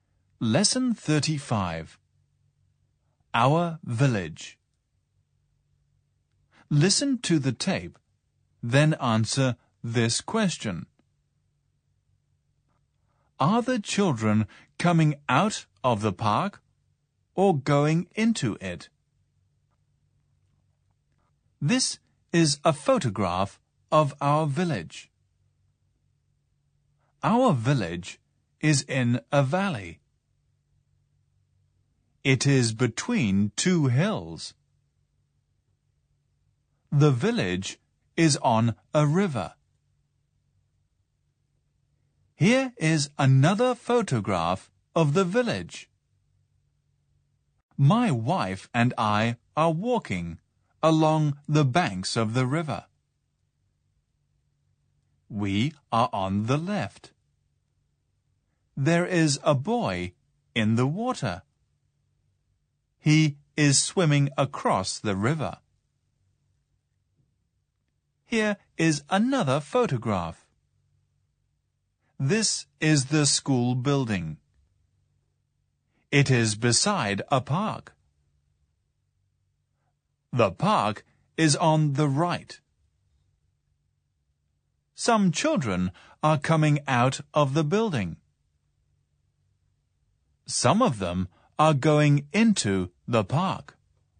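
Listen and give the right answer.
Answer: Going into it (they are coming out of the school building)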